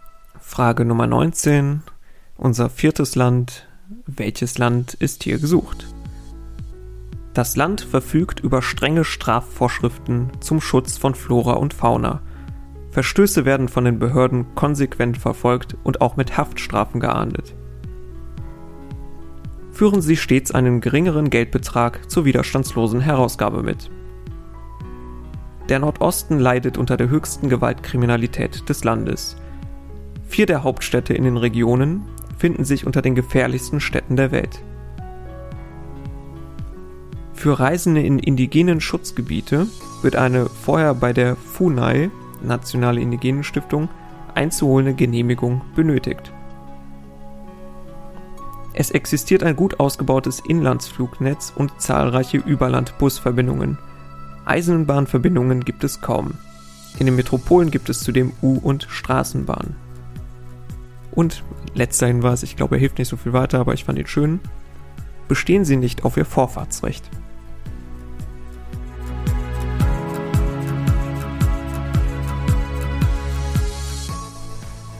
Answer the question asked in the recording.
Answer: ist Brasilien.